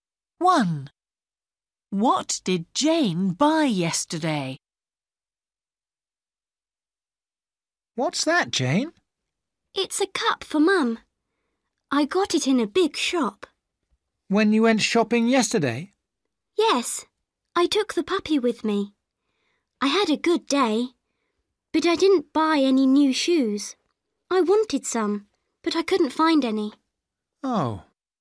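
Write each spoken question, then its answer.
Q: What did Jane buy yesterday?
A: a cup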